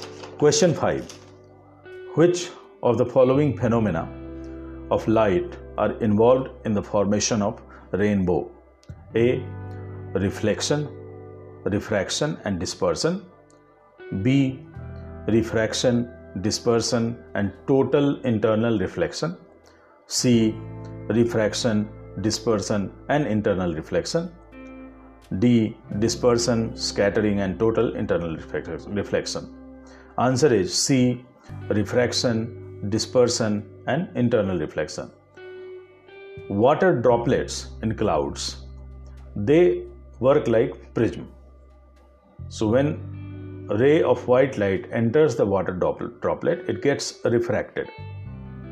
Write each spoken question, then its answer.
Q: Which of the following phenomena of light are involved in the formation of rainbow?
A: answer is c refraction dispersion and internal reflection